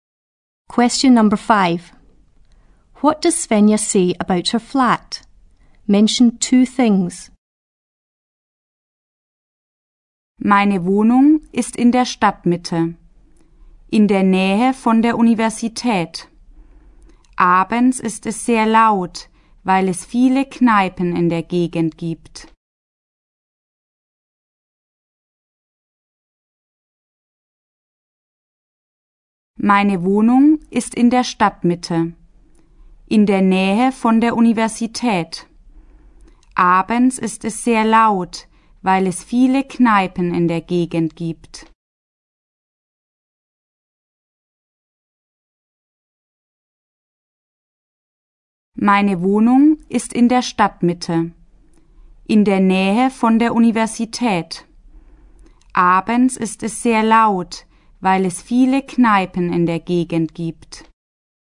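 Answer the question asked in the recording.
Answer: It is in the town centre near the university; it is very noisy in the evenings because of the many pubs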